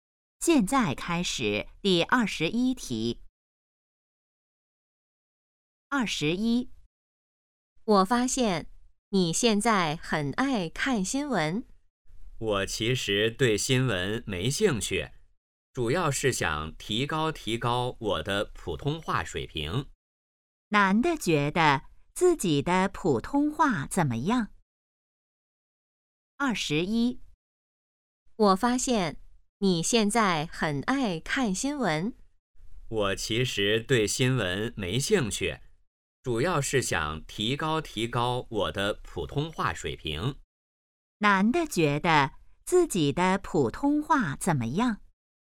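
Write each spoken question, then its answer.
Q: 男的觉得自己的普通话怎么样?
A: 需要提高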